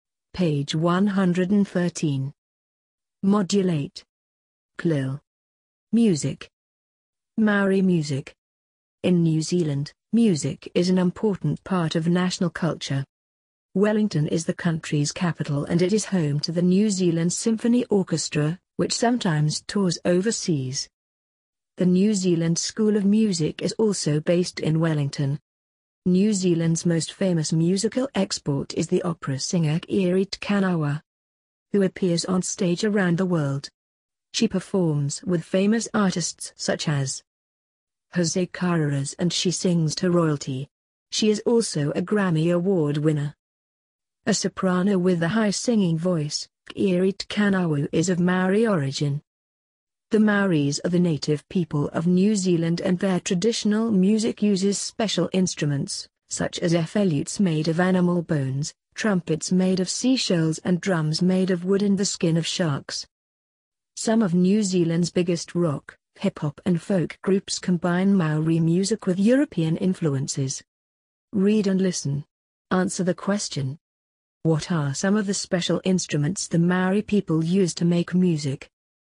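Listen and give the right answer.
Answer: Flutes made of animal bones, trumpets made of seashells, and drums made of wood and shark skin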